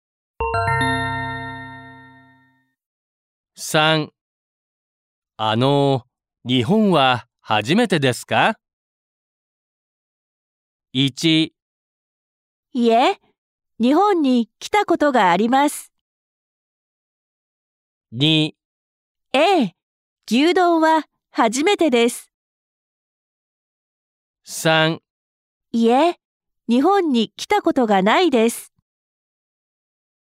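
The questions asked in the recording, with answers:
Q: さん、日本は初めてですか?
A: 1: いえ、日本に来たことがあります。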